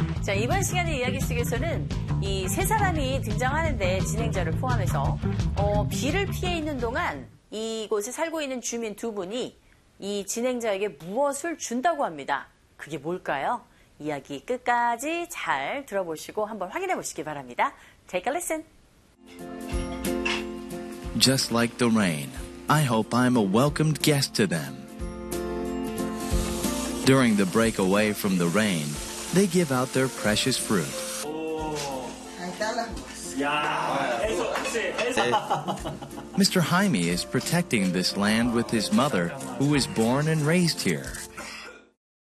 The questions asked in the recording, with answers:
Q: 비를 피해 있는 동안 이곳에 살고 있는 주민 두 분이 이 진행자에게 무엇을 준다고 합니다. 그게 뭘까요?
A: 바로 이 귀한 과일들을 주고 있는 것이죠.